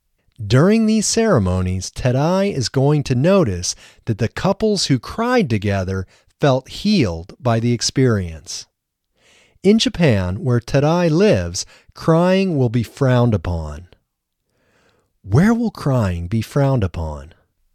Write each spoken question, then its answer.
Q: Where will crying be frowned upon?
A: Crying will be frowned upon in Japan.